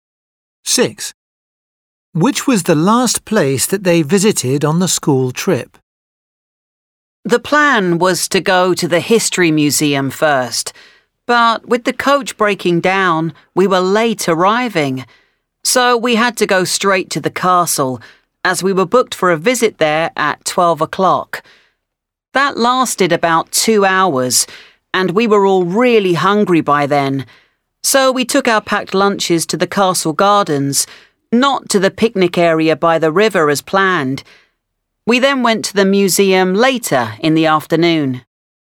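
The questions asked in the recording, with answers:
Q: Which was the last place that they visited on the school trip?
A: the History Museum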